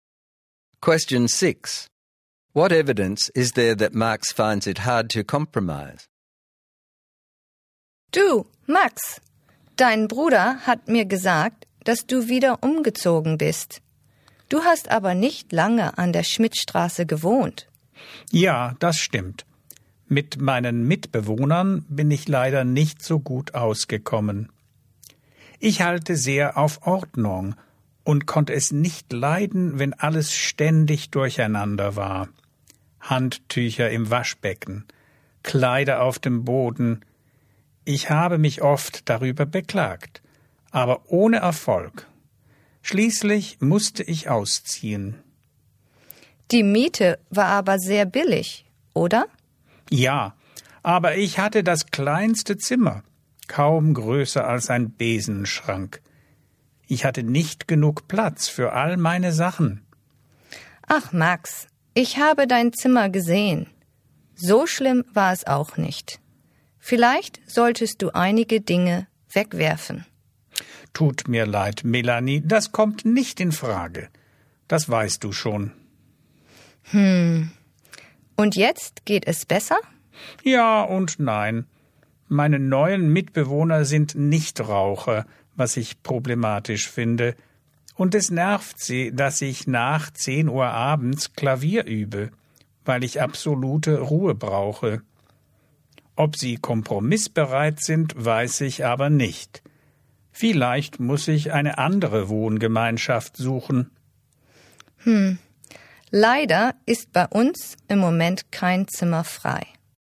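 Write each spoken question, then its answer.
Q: What evidence is there that Max finds it hard to compromise?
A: He moved out over untidy flatmates, refuses to throw things away, finds non-smoking flatmates a problem, practises piano after 10pm, and may move again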